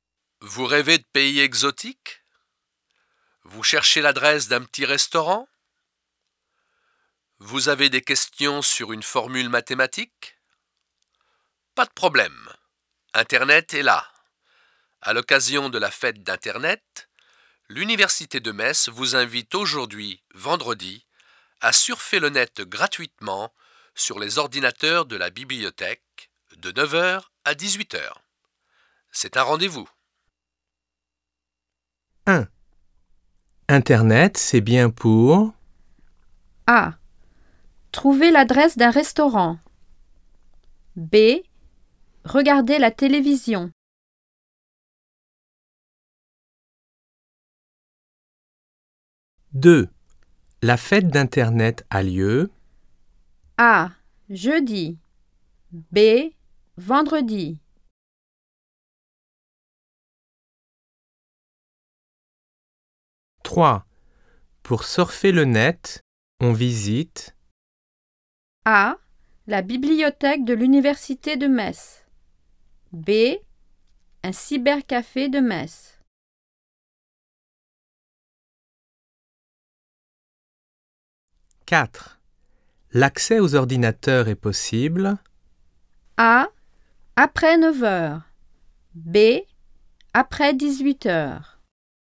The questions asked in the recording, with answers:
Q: Internet, c'est bien pour...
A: 1. A.

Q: La fête d'Internet a lieu...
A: 2. B.

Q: Pour surfer le net, on visite...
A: 3. A.

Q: L'accès aux ordinateurs est possible.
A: 4. A.